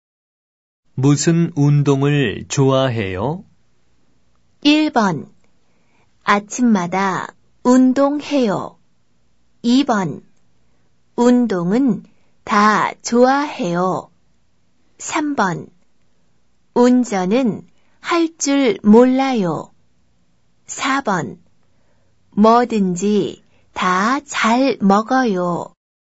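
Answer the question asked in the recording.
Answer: 2: 운동은 다 좋아해요.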